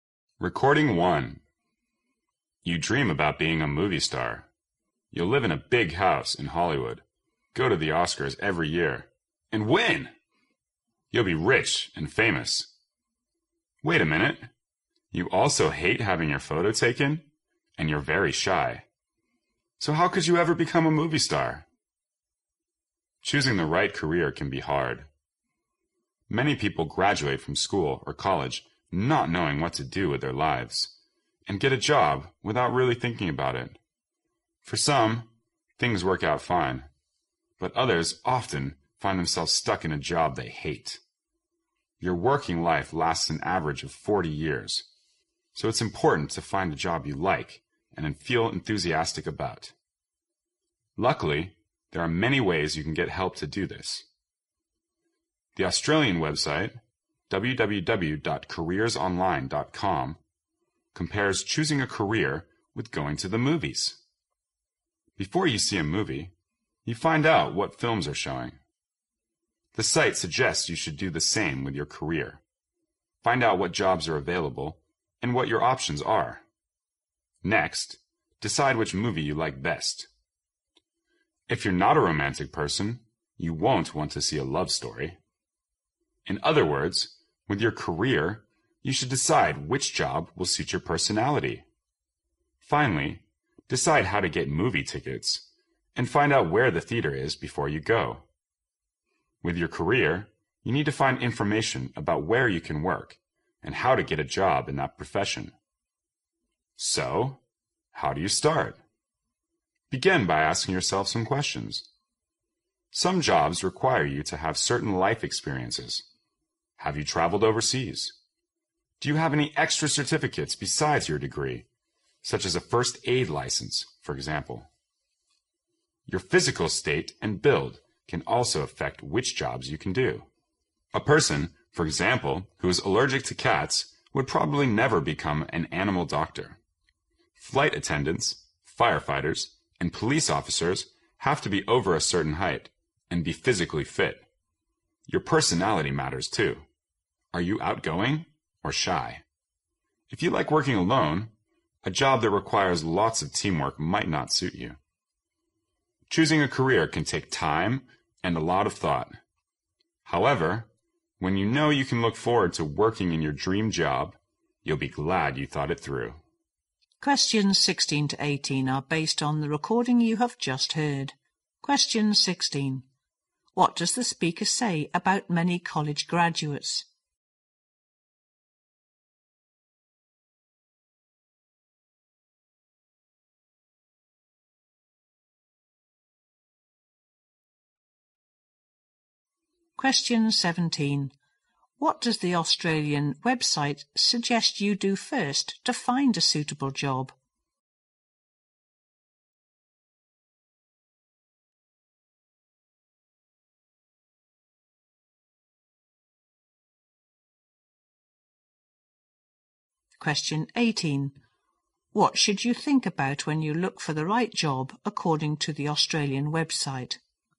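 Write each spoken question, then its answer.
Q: What does the speaker say about many college graduates?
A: They don't know what to do with their lives and take a job without really thinking about it

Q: What does the Australian website suggest you do first to find a suitable job?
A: Find out what jobs are available and what your options are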